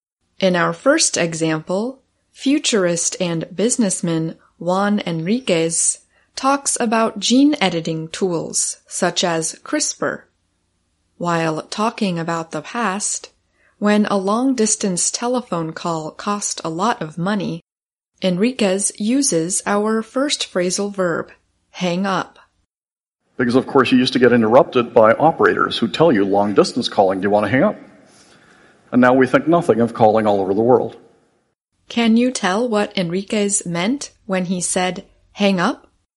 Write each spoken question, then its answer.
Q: Can you tell what Enriquez meant when he said hang up?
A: to end or finish a phone call